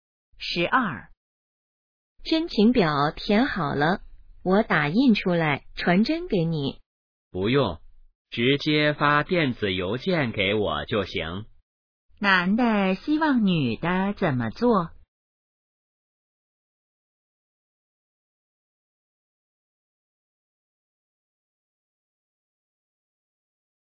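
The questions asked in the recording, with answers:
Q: 男的希望女的怎么做?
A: 发电子邮件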